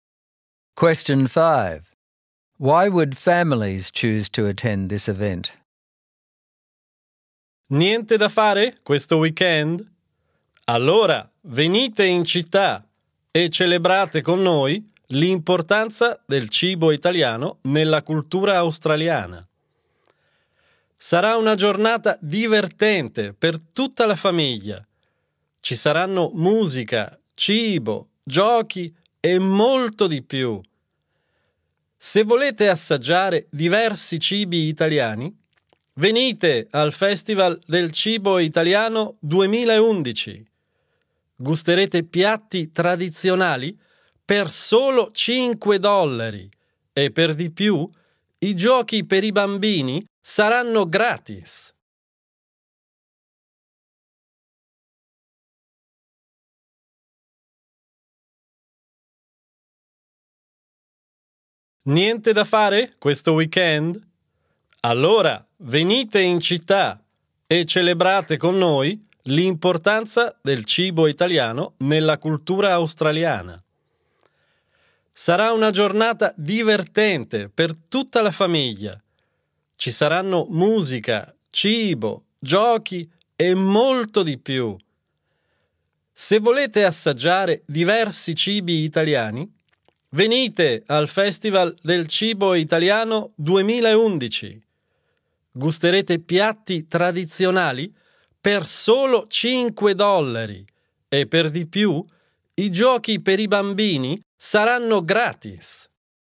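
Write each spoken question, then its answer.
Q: Why would families choose to attend this event?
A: It is a fun day for the whole family, with music, food and games. Traditional dishes cost only $5 and the children's games are free.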